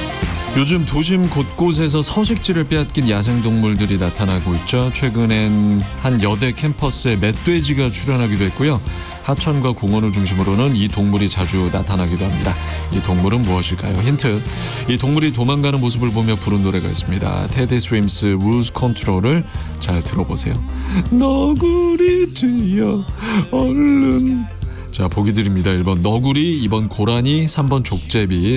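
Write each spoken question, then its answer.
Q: 이 동물은 무엇일까요?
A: 1번: 너구리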